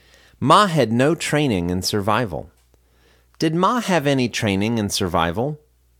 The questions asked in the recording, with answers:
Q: Did Ma have any training in survival?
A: No, he had no training in survival.